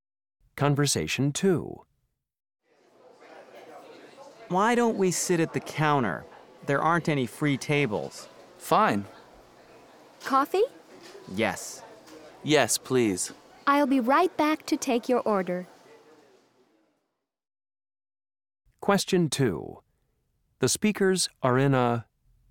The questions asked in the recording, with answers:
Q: The speakers are in a...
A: This is my favorite diner.